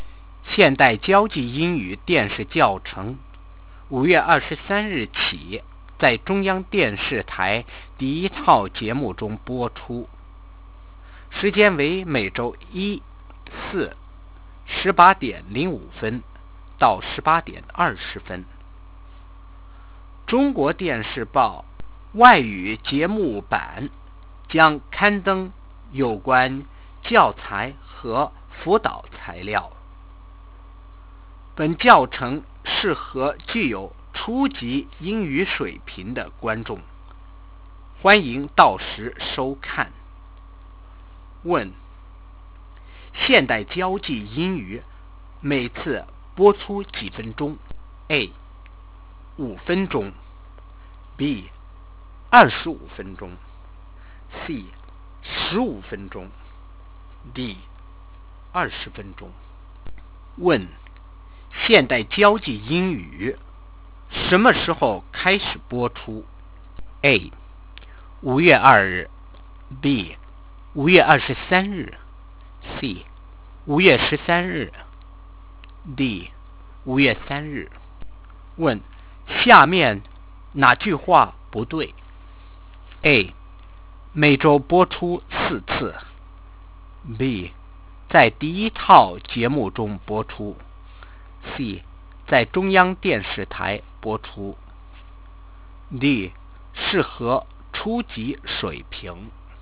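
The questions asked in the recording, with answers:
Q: 现代交际英语每次播出几分钟 ?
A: C: 15分钟

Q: 现代交际英语什么时候开始播出 ?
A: B: 5月23日

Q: 下面哪句话不对 ?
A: A: 每周播出四次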